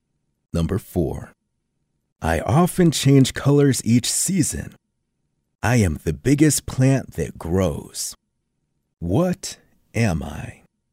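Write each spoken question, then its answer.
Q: What am I?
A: a tree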